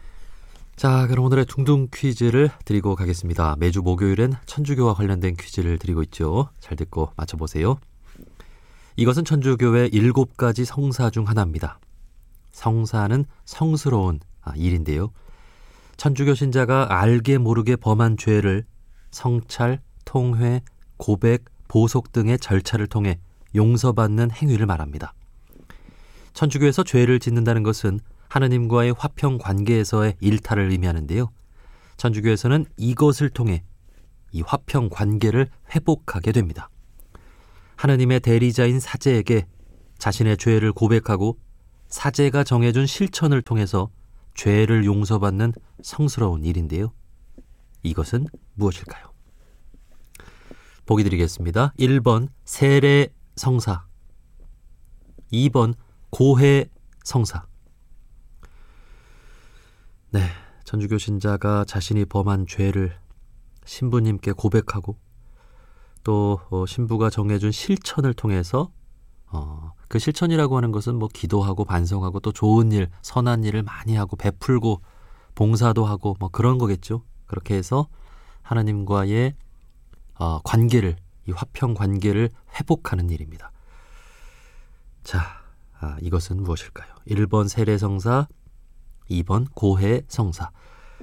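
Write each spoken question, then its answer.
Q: 자, 이것은 무엇일까요? 1번 세례성사, 2번 고해성사.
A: 2번: 고해 성사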